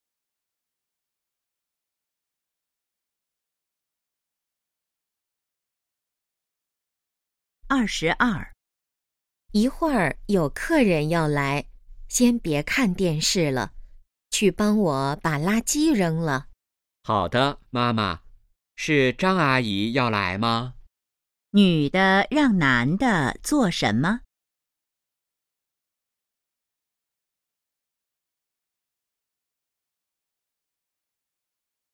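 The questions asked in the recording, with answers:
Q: 女的让男的做什么?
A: 扔垃圾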